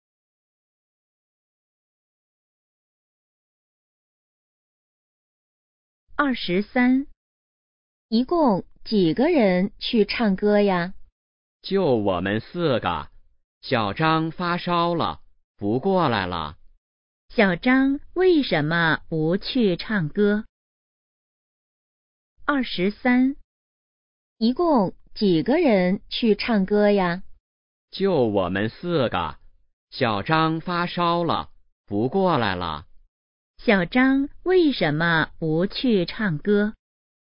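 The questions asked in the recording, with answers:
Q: 小张为什么不去唱歌?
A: 发烧了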